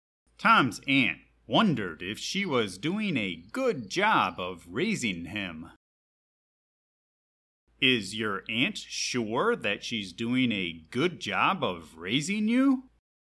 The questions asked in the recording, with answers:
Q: Is your aunt sure that she's doing a good job of raising you?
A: No, she is not sure. She tries to do a good job, but she is not sure.